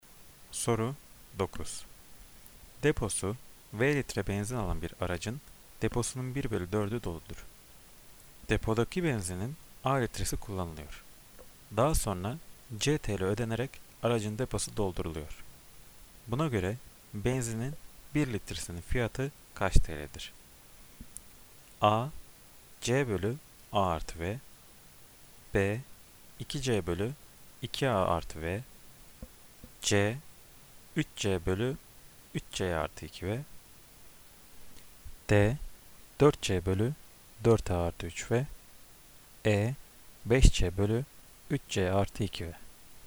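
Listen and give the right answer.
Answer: D: 4C bölü 4A artı 3V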